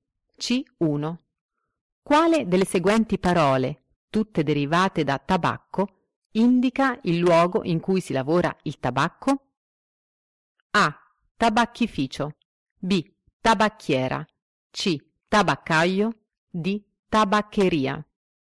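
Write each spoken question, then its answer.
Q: Quale delle seguenti parole, tutte derivate da tabacco, indica il luogo in cui si lavora il tabacco?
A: A: Tabacchificio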